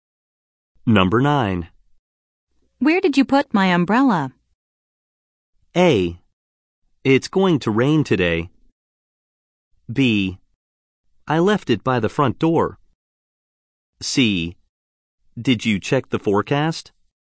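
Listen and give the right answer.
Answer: B: I left it by the front door.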